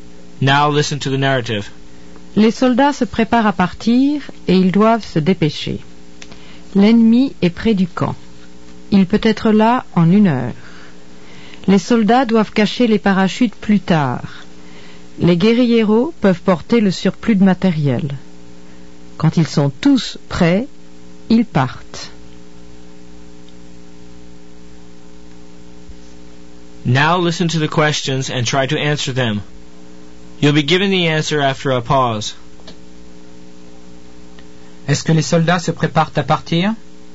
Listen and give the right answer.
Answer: Oui, les soldats se préparent à partir.